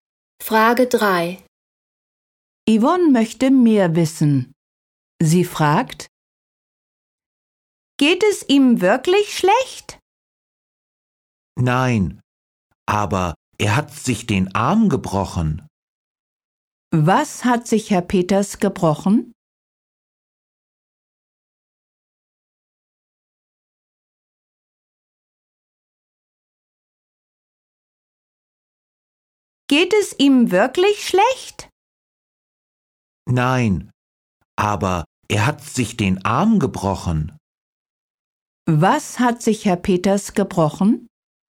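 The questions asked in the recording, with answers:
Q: Was hat sich Herr Peters gebrochen?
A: Den Arm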